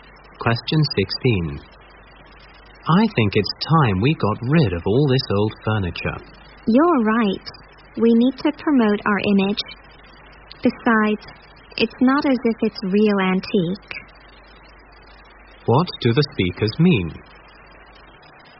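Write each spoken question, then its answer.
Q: What do the speakers mean?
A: They agree to get rid of the old furniture because it is not real antique and they need to improve their image.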